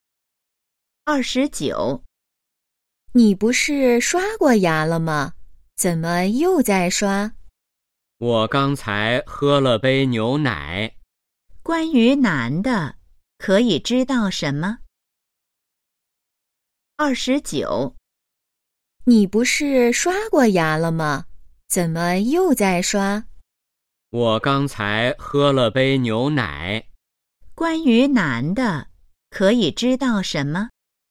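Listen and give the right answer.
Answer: 他喝了牛奶后又在刷牙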